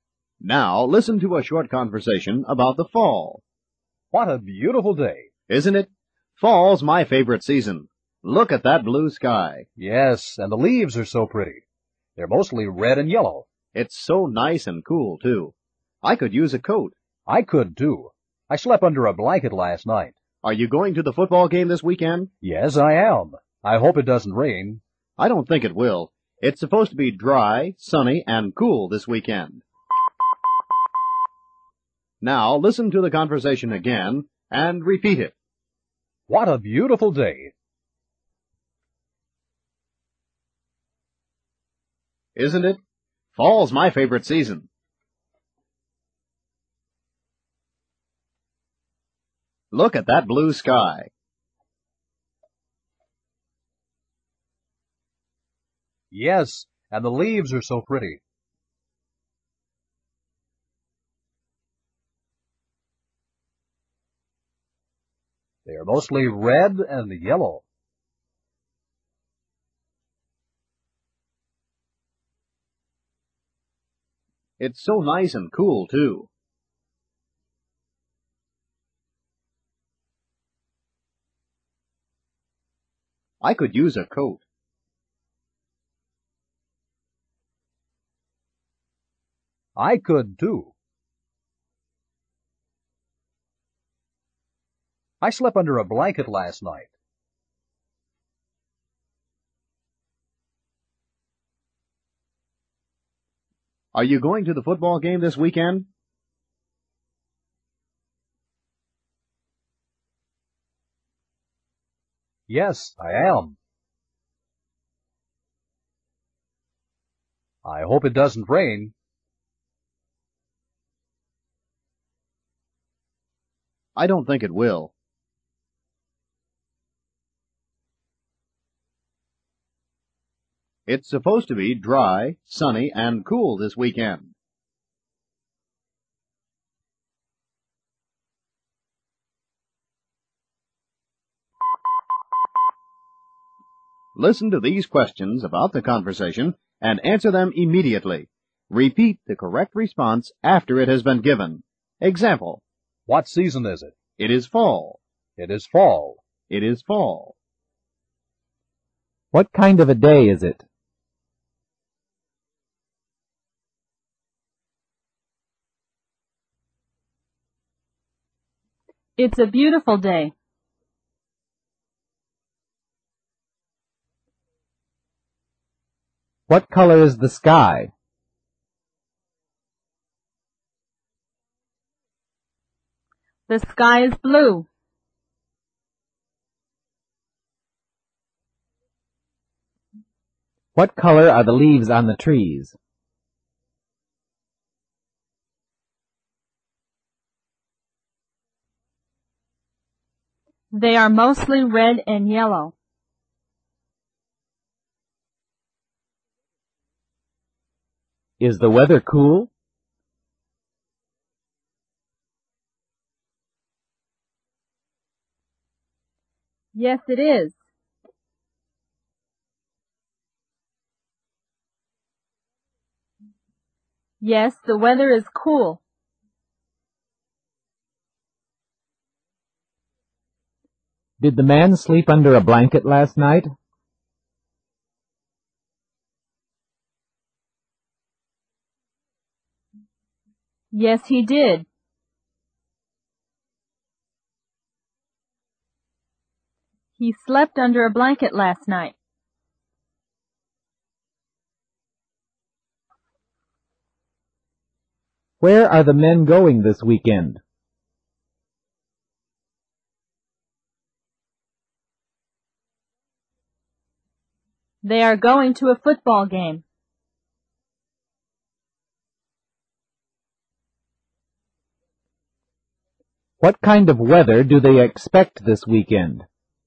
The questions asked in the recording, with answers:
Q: What kind of a day is it?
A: It's a beautiful day.

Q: What color is the sky?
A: The sky is blue.

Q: What color are the leaves on the trees?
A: They are mostly red and yellow.

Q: Is the weather cool?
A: Yes, it is.

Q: Did the man sleep under a blanket last night?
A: Yes, he did.

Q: What kind of weather do they expect this weekend?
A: The weather is supposed to be dry, sunny, and cool.